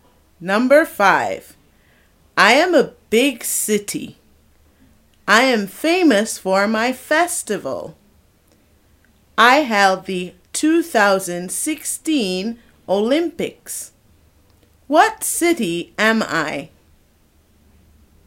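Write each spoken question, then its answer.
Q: What city am I?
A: Rio de Janeiro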